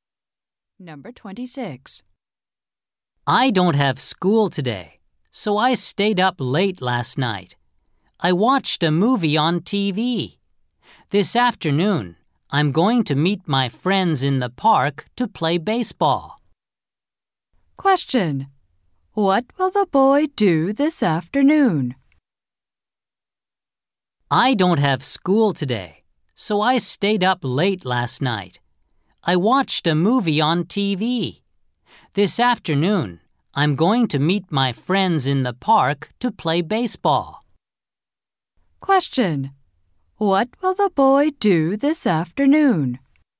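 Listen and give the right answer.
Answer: Play baseball with friends in the park.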